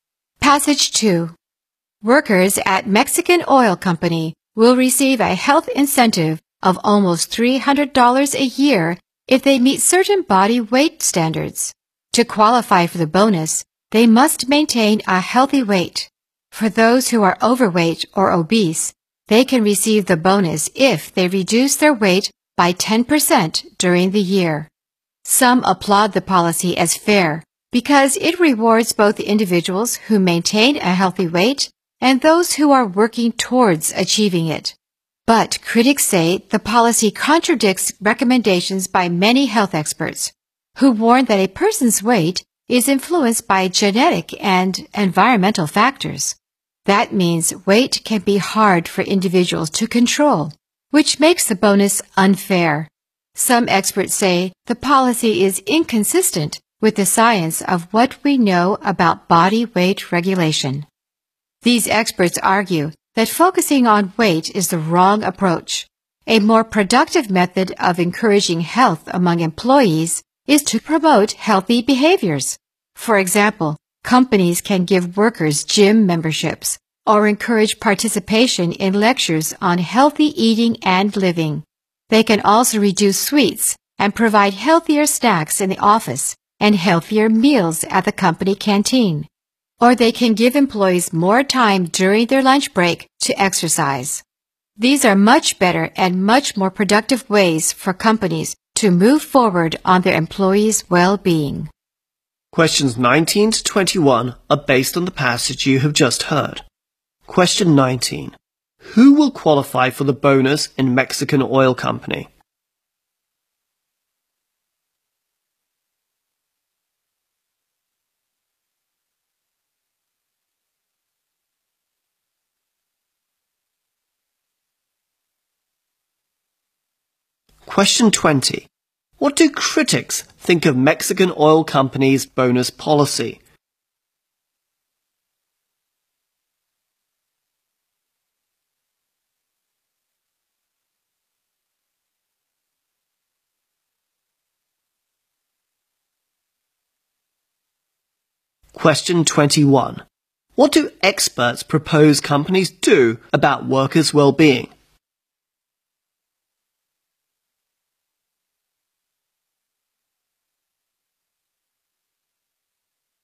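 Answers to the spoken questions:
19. Workers who keep a healthy weight, or overweight workers who lose 10% of their weight
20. It is unfair, because weight is hard for people to control
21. Promote healthy behaviors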